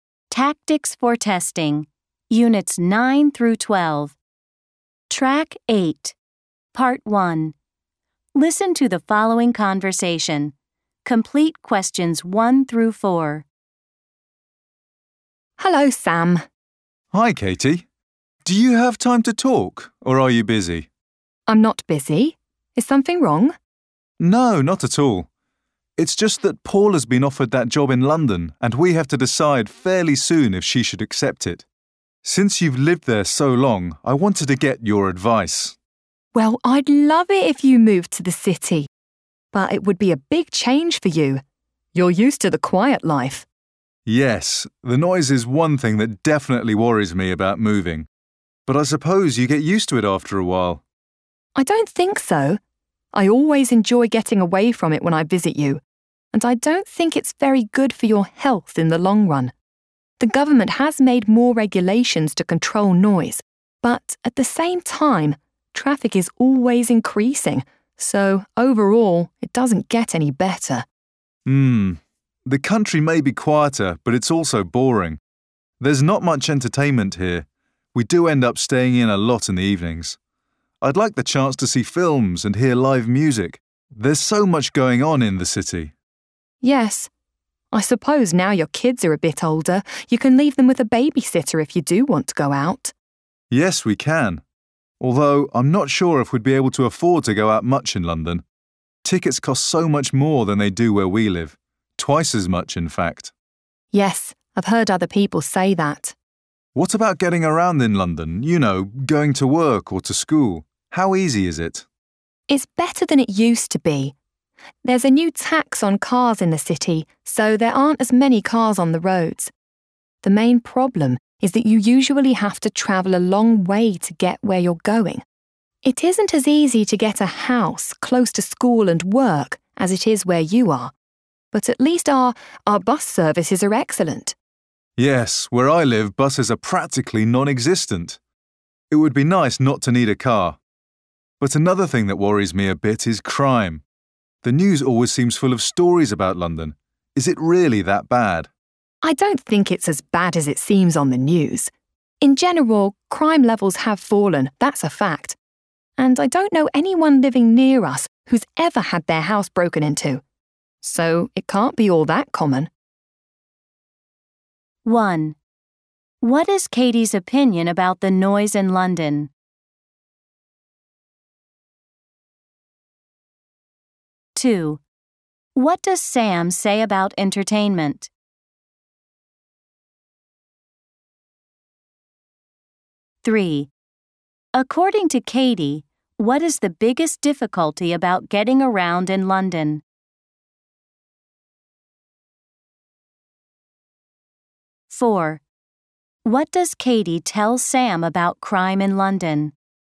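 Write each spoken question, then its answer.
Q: What is Katie's opinion about the noise in London?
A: It's bad for your health in the long run, and it isn't getting any better because traffic keeps increasing

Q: What does Sam say about entertainment?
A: There's not much entertainment where he lives; he'd like the chance to see films and hear live music in the city

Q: According to Katie, what is the biggest difficulty about getting around in London?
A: You usually have to travel a long way to get where you're going

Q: What does Katie tell Sam about crime in London?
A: It isn't as bad as it seems on the news; crime levels have fallen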